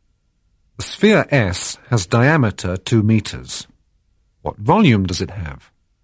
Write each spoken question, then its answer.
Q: What volume does it have?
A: The sphere S has volume 4,189 liters.